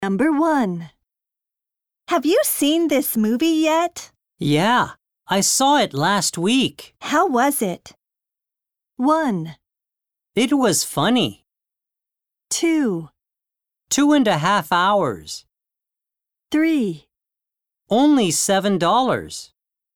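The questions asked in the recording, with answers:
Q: How was it?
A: 1: It was funny.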